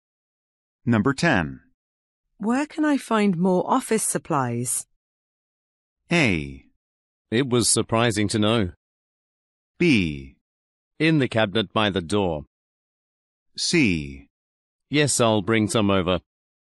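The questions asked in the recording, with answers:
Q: Where can I find more office supplies?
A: B: In the cabinet by the door.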